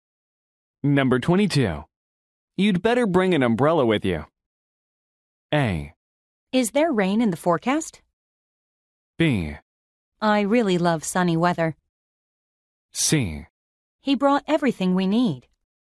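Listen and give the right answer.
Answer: A: Is there rain in the forecast?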